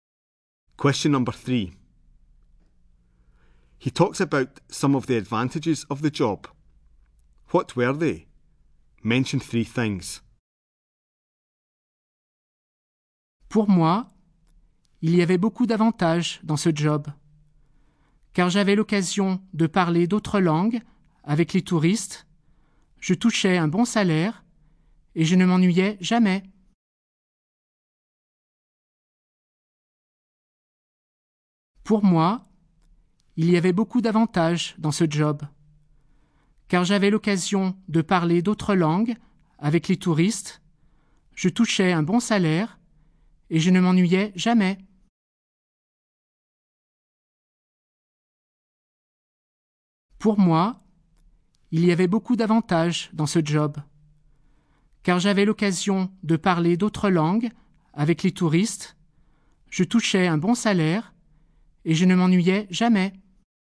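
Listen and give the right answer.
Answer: Chance to speak other languages with tourists; good salary; never bored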